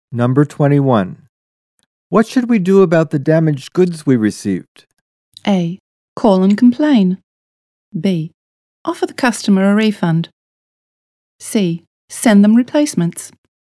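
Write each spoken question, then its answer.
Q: What should we do about the damaged goods we received?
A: A: Call and complain.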